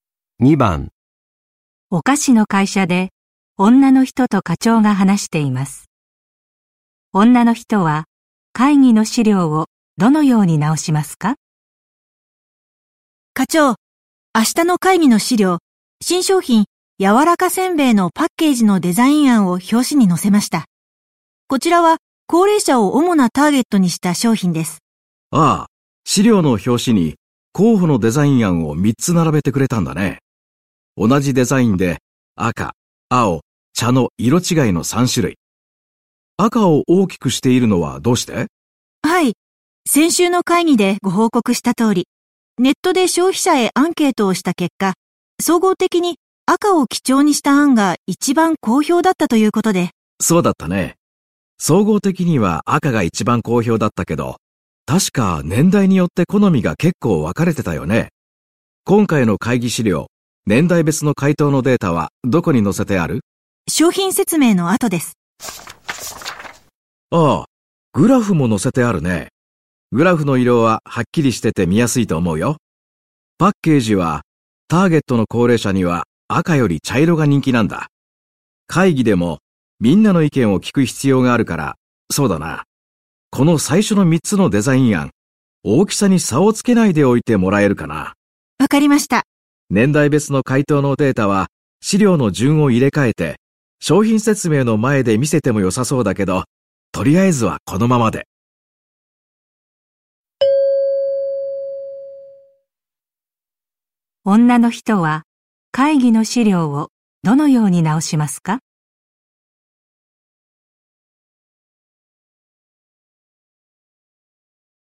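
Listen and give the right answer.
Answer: 表紙の3つのデザイン案の大きさに差をつけないようにする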